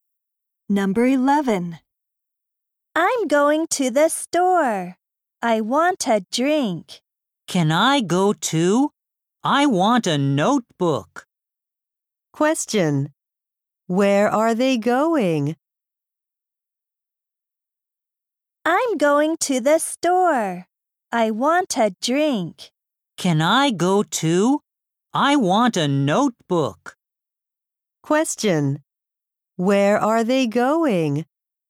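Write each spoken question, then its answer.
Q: Where are they going?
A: To the store.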